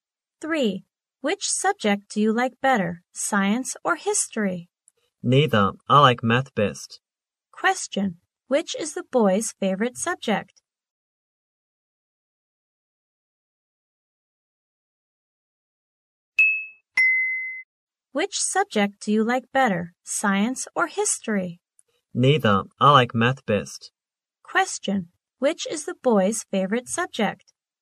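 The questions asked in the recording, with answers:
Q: Which is the boy's favorite subject?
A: Math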